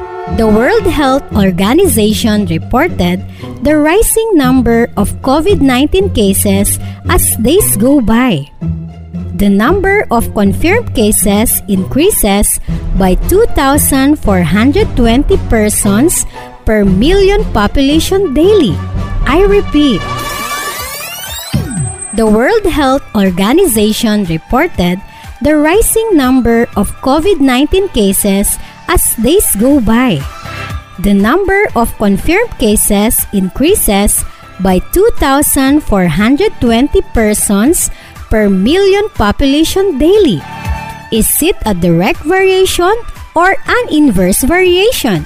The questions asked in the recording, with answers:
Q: Is it a direct variation or an inverse variation?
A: Direct variation, ma'am.